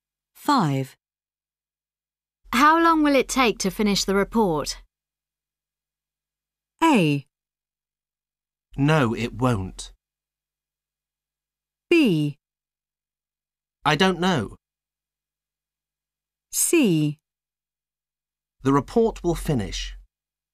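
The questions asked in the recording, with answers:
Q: How long will it take to finish the report?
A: B: I don't know.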